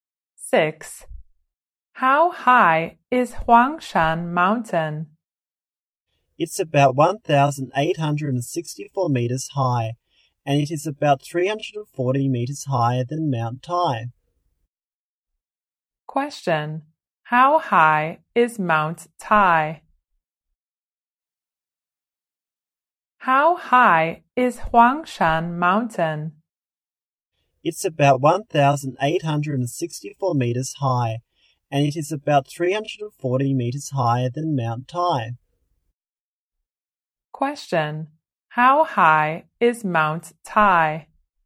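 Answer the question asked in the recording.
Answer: About 1,524 meters high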